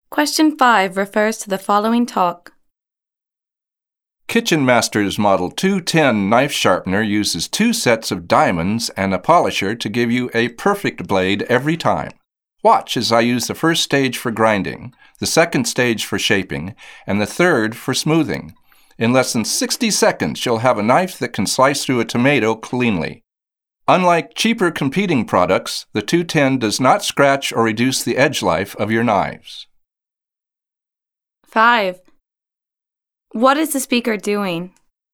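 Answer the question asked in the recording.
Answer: Demonstrating a knife sharpener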